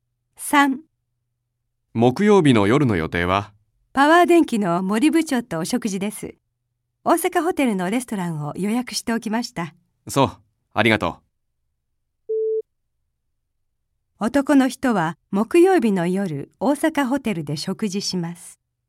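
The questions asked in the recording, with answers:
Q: 男の人は木曜日の夜、大阪ホテルで食事します。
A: ○(正しい)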